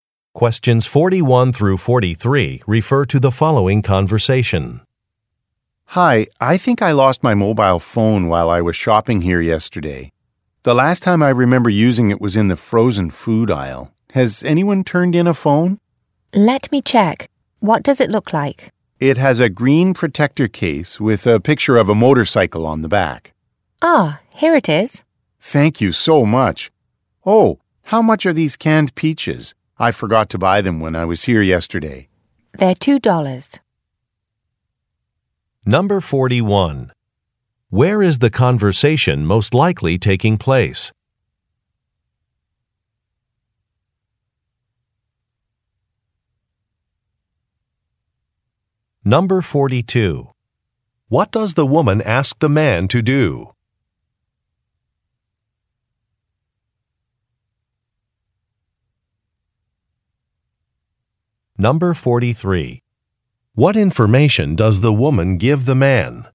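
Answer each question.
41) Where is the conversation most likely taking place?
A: At a grocery store

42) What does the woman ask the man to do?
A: Describe a phone

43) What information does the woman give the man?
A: The price of an item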